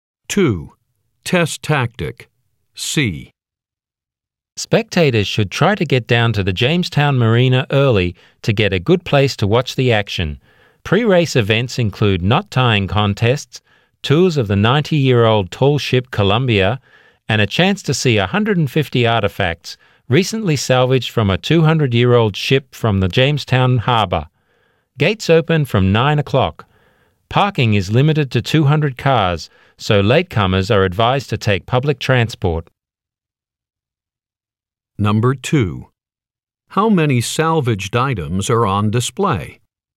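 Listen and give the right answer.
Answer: 150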